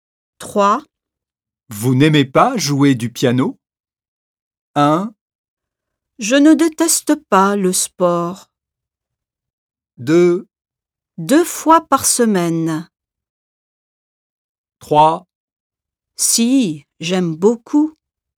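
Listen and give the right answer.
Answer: 3: Si, j'aime beaucoup.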